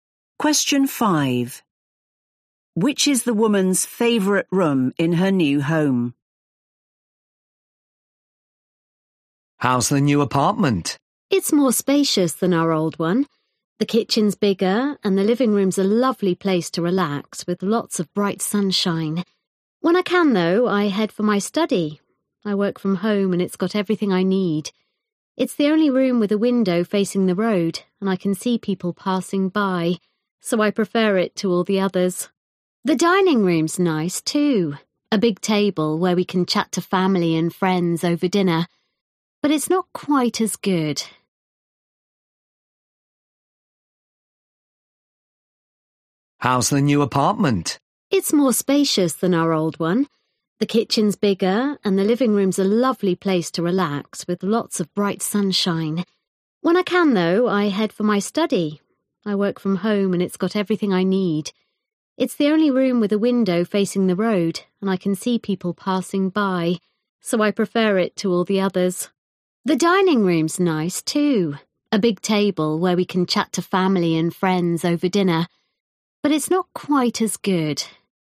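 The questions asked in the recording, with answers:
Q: Which is the woman's favorite room in her new home?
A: her study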